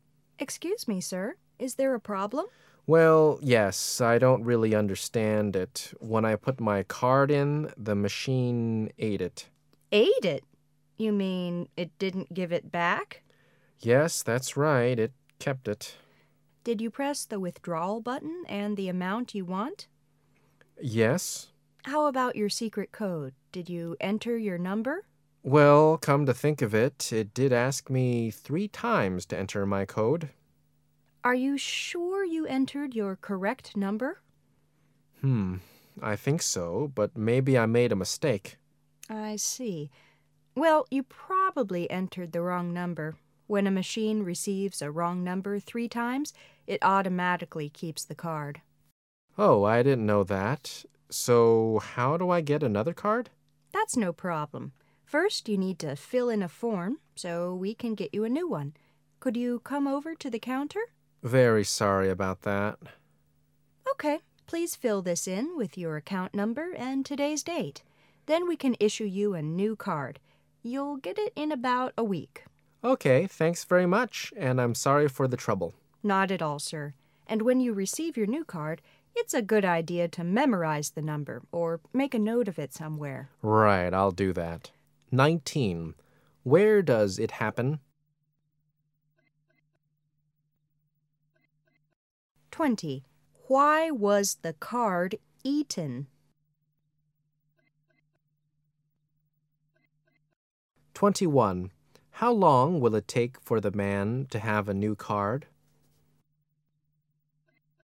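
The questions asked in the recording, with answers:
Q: Where does it happen?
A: At a bank (cash machine)

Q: Why was the card eaten?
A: He entered the wrong code three times

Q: How long will it take for the man to have a new card?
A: About a week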